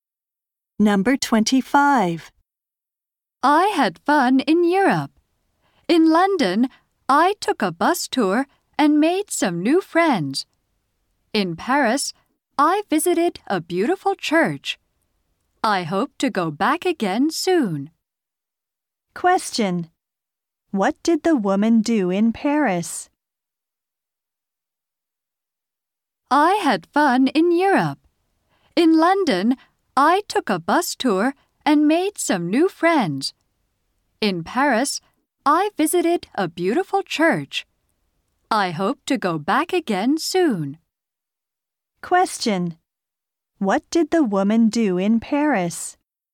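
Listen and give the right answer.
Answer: She visited a beautiful church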